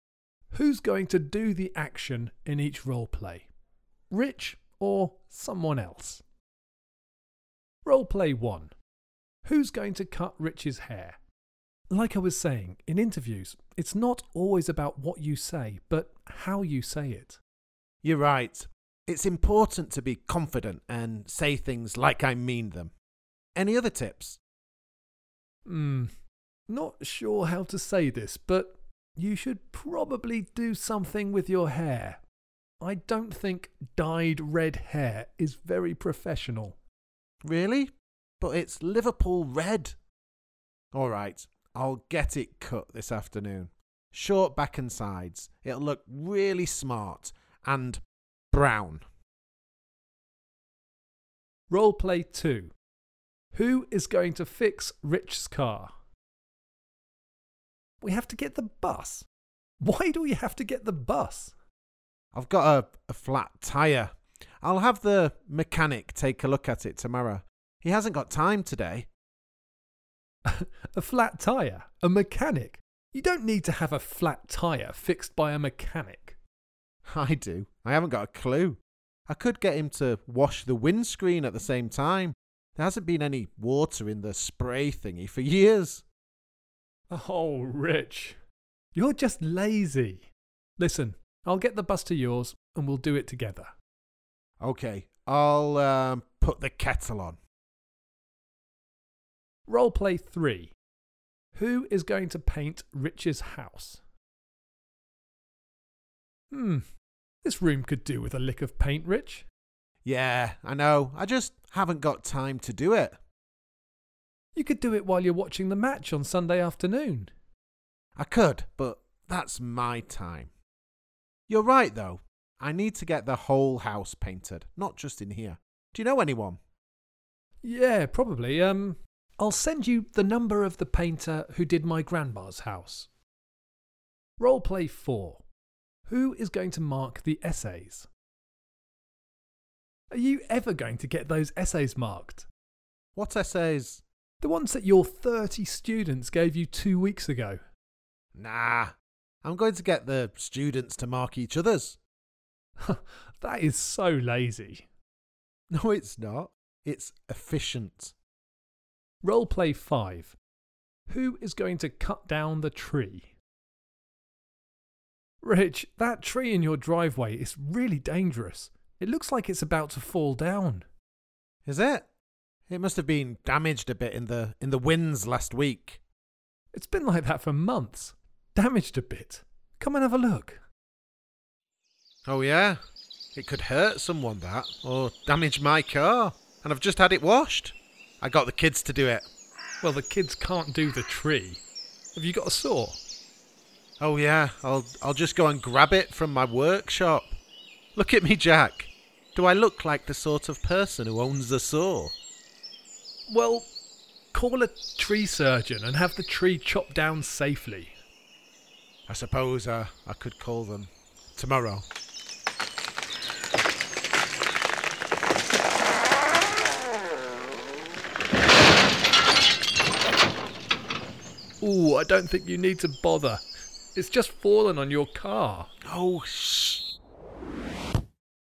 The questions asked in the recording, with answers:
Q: Who's going to cut Rich's hair?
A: The hairdresser.

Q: Who is going to fix Rich's car?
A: I wanted the mechanic to do it, but you said we'd do it together, so probably just you.

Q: Who is going to paint Rich's house?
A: You've got a contact for me.

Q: Who is going to mark the essays?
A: That would be my students.

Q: Who is going to cut down the tree?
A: Well, it came down on its own, didn't it?